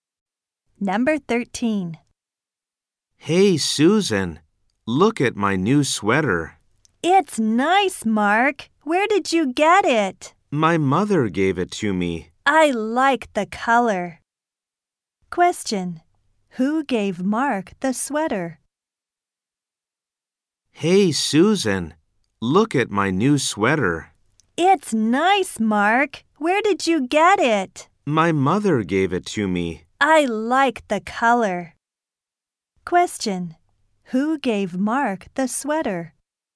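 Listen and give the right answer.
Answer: His mother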